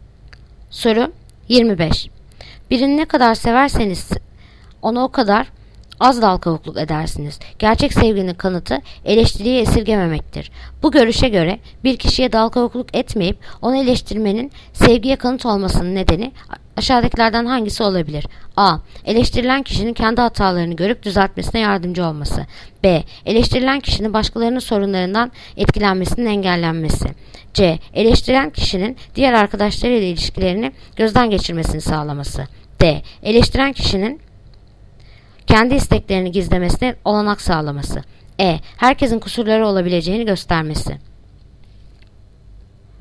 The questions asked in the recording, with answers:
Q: Bu görüşe göre bir kişiye dalkavukluk etmeyip onu eleştirmenin sevgiye kanıt olmasının nedeni aşağıdakilerden hangisi olabilir?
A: Yanıt: Adana. Eleştirilen kişinin kendi hatalarını görüp düzeltmesine yardımcı olması.